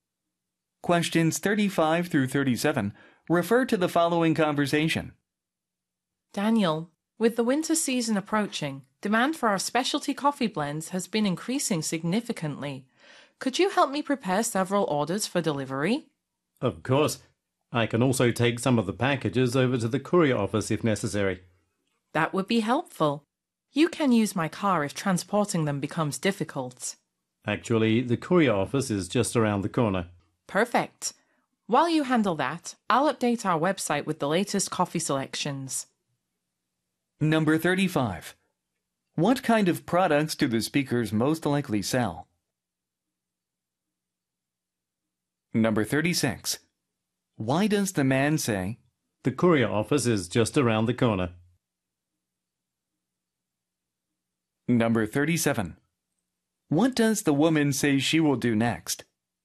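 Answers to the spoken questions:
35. Specialty coffee blends
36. He doesn't need to use her car
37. Update the website with the latest coffee selections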